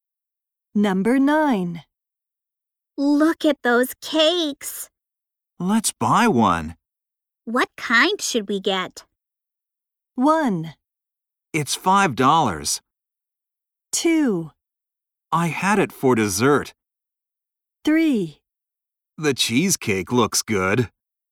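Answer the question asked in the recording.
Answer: 3: The cheesecake looks good.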